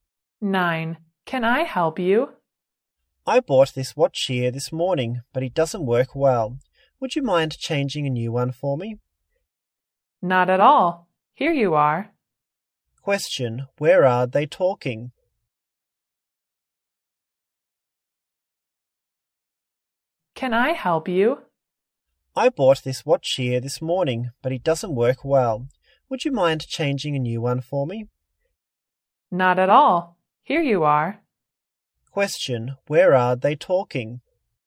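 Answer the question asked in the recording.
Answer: In a shop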